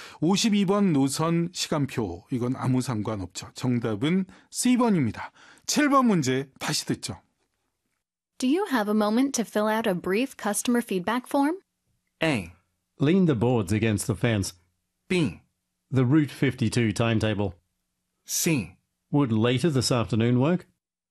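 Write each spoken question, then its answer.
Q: Do you have a moment to fill out a brief customer feedback form?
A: C: Would later this afternoon work?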